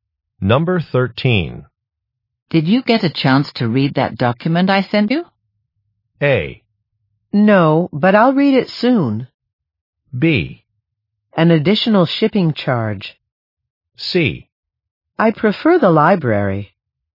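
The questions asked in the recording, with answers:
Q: Did you get a chance to read that document I sent you?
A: A: No, but I'll read it soon.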